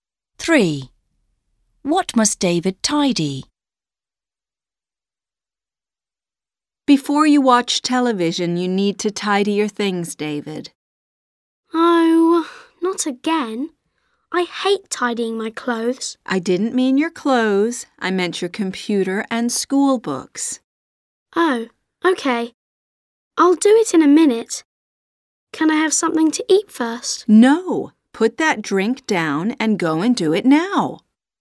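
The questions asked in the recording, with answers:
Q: What must David tidy?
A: His computer and school books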